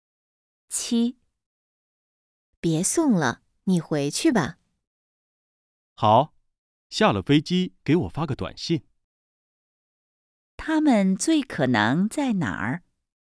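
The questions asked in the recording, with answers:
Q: 他们最可能在哪儿?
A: 机场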